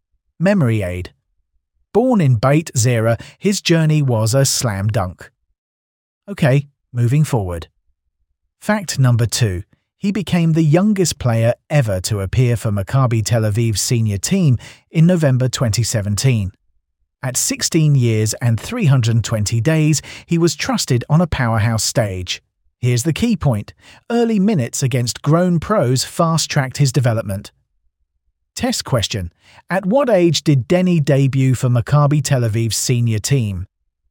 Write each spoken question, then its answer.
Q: At what age did Denny debut for Maccabi Tel Aviv's senior team?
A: Correct answer, 16 years and 320 days.